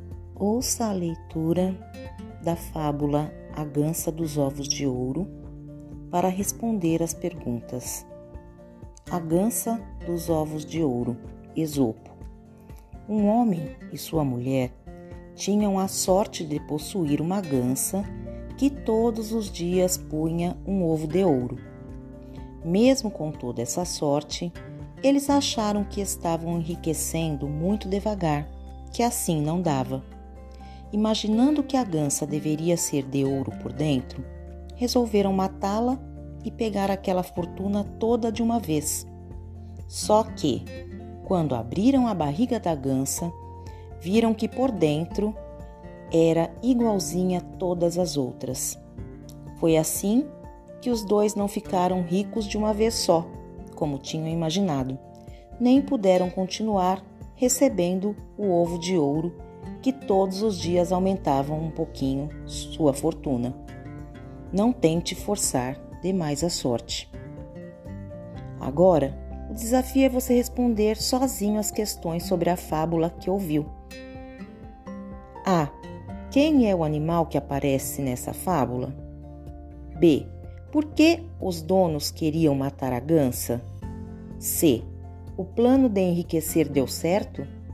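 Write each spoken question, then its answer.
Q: Quem é o animal que aparece nessa fábula?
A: Uma gansa (a gança dos ovos de ouro)

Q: Por que os donos queriam matar a gança?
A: Porque achavam que ela era de ouro por dentro e queriam pegar a fortuna toda de uma vez

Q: O plano de enriquecer deu certo?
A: Não, porque por dentro a gansa era igual às outras e eles perderam os ovos de ouro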